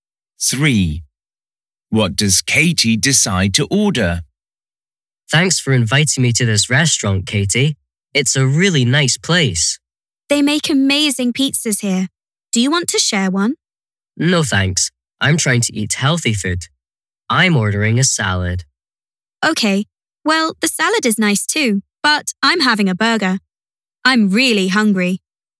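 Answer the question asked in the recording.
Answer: a burger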